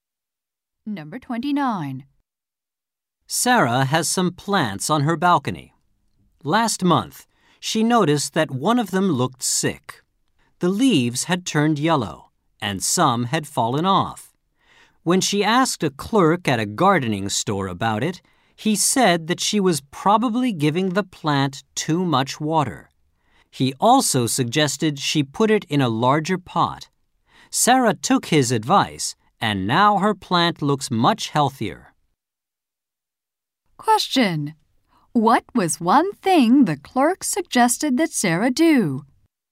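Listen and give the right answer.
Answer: Put the plant in a larger pot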